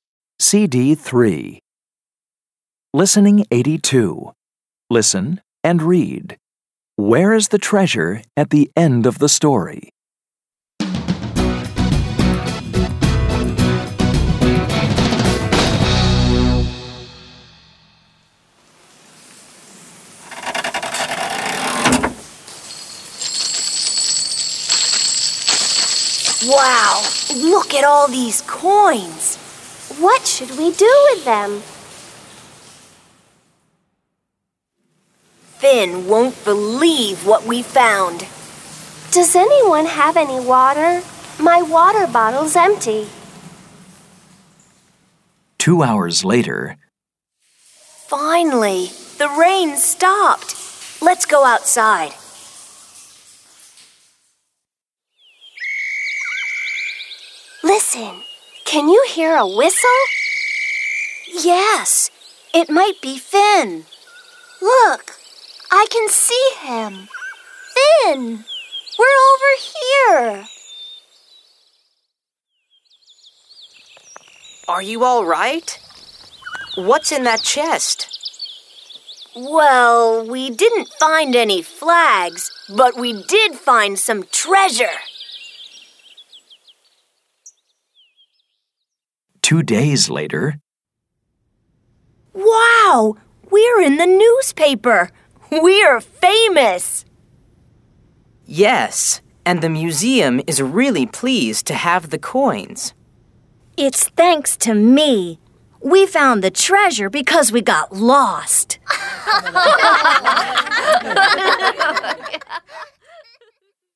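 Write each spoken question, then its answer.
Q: Where is the treasure at the end of the story?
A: In the museum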